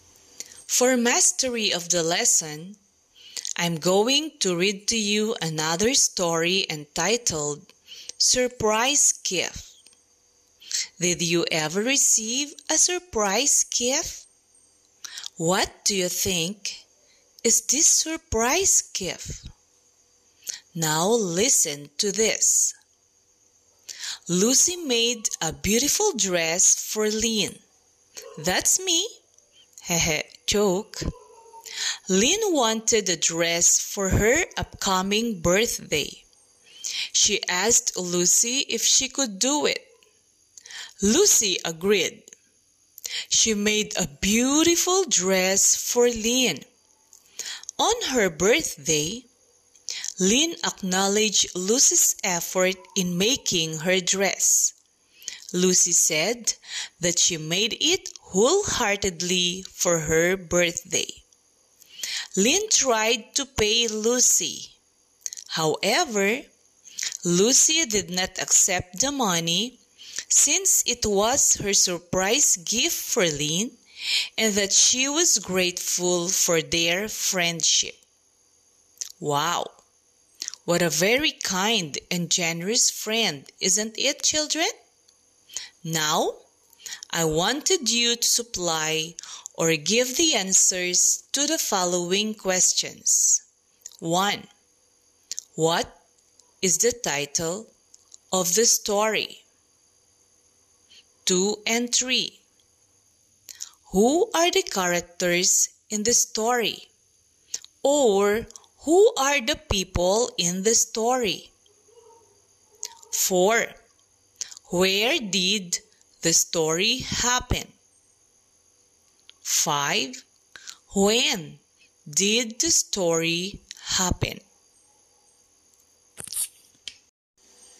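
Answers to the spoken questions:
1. Surprise Gift
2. Lucy and Lynn
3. On Lynn's birthday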